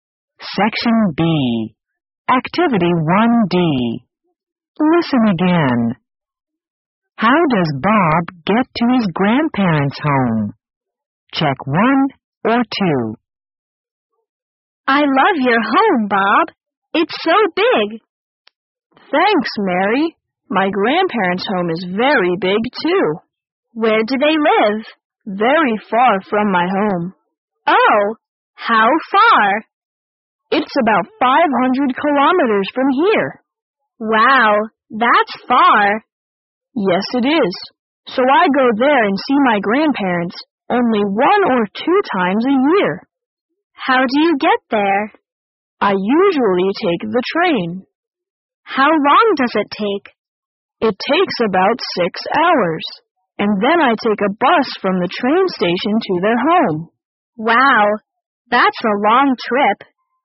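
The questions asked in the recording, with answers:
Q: How does Bob get to his grandparents' home?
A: He takes the train, then a bus from the train station.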